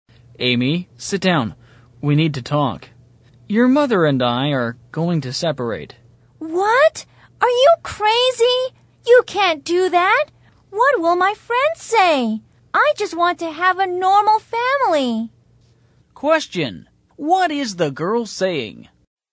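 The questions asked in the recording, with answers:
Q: What is the girl saying?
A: She is against her parents separating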